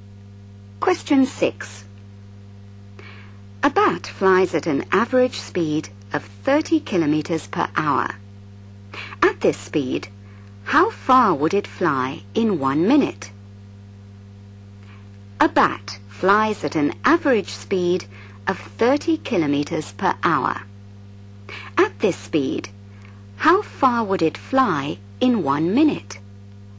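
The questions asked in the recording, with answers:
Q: At this speed, how far would it fly in 1 minute?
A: 0.5 km (500 m)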